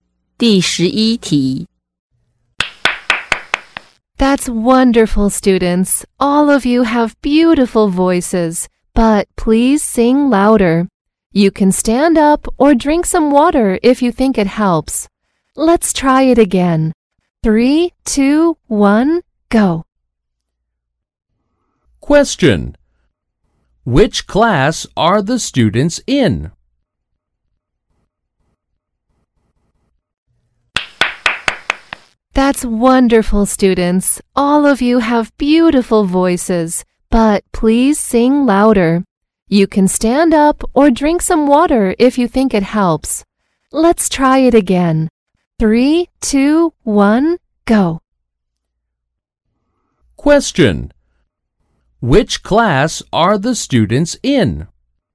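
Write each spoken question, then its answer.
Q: Which class are the students in?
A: A music (singing) class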